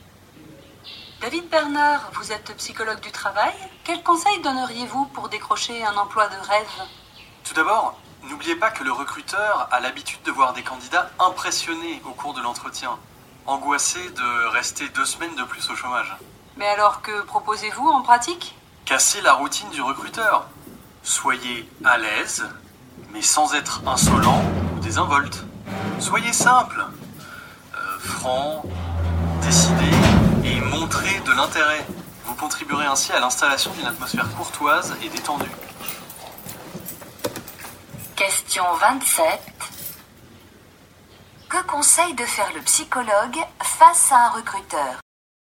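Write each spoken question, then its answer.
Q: Que conseille de faire le psychologue face à un recruteur?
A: Casser la routine en étant à l'aise, simple, franc et intéressé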